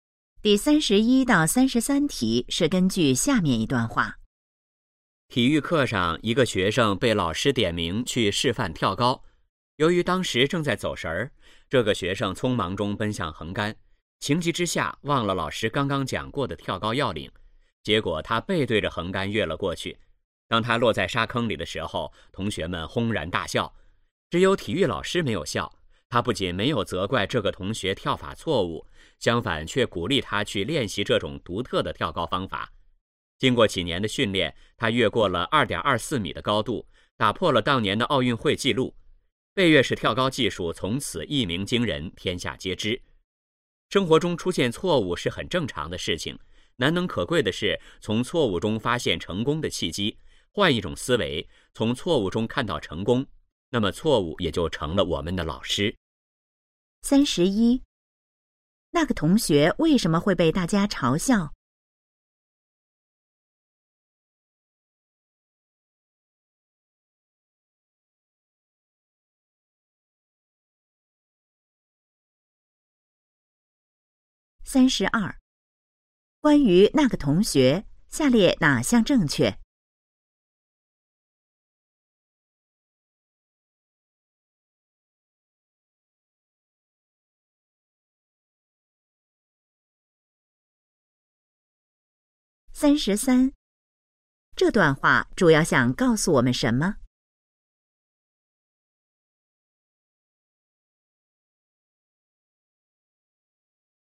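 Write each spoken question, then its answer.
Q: 那个同学为什么会被大家嘲笑?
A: 他背对着横杆跳了过去

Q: 这段话主要想告诉我们什么?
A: 要从错误中发现成功的契机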